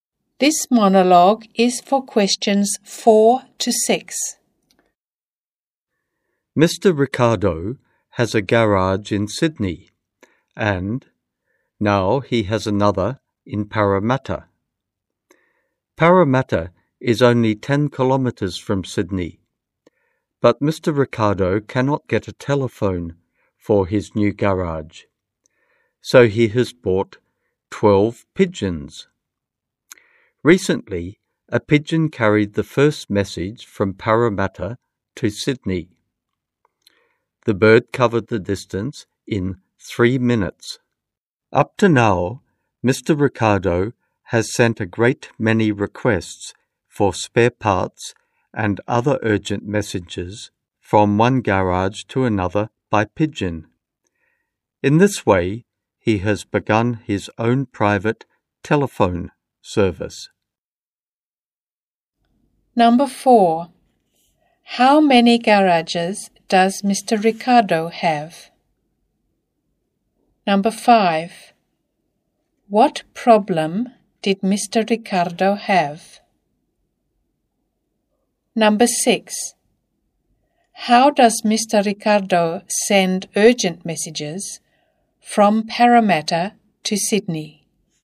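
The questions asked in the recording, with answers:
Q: How many garages does Mr.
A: Two

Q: What problem did Mr. Ricardo have?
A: He couldn't get a telephone for his new garage

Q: How does Mr. Ricardo send urgent messages from Parramatta to Sydney?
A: By pigeon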